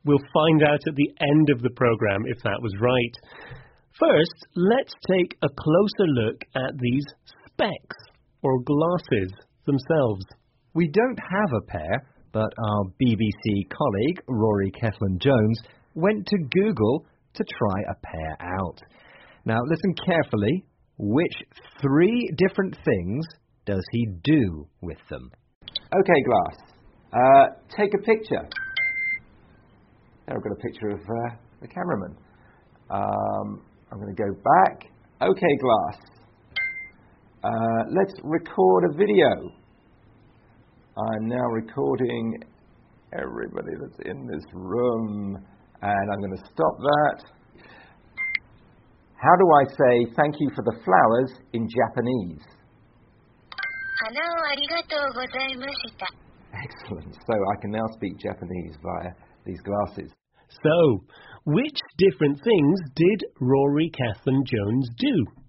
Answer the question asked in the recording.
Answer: Number one, he took a picture.